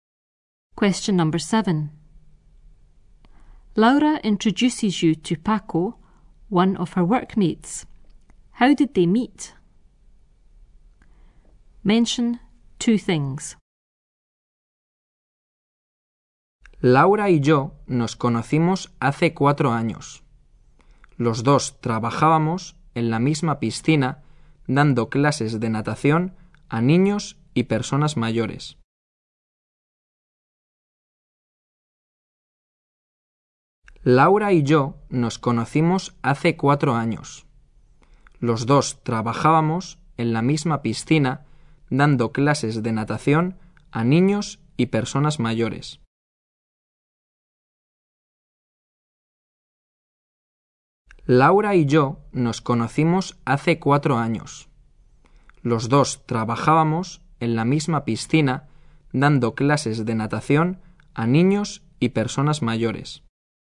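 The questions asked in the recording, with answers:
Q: How did they meet? Mention two things.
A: Four years ago, working at the same pool teaching swimming to children and older people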